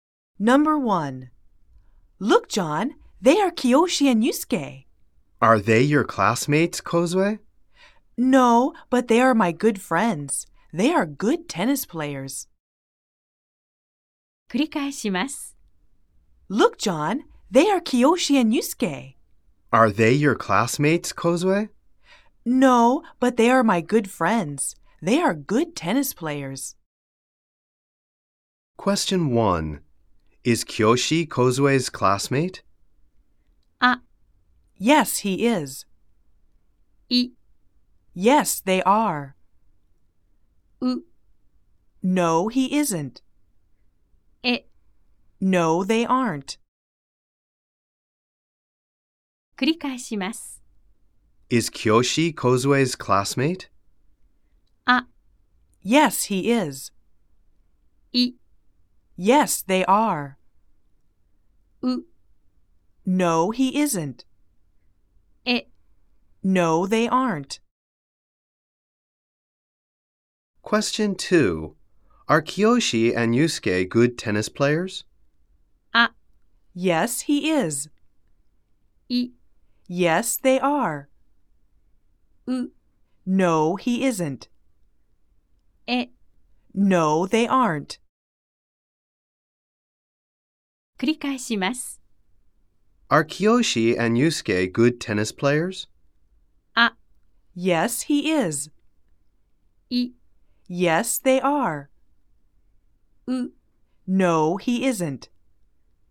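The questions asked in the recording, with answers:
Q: Is Kiyoshi Kozue's classmate?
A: う: No, he isn't.

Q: Are Kiyoshi and Yusuke good tennis players?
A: い: Yes, they are.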